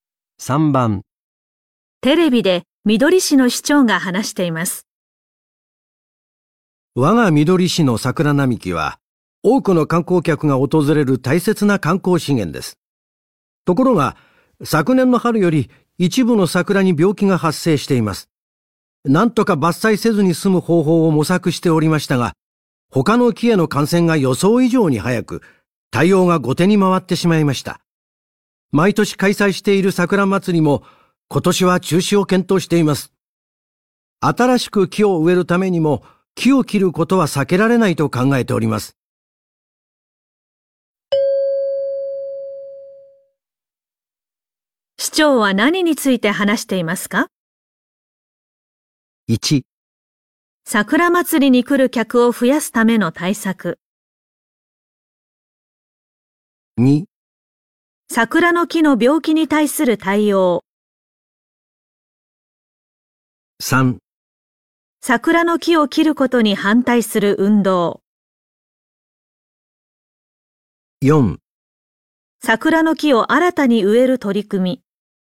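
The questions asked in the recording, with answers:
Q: 市長は何について話していますか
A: 2: 桜の木の病気に対する対応。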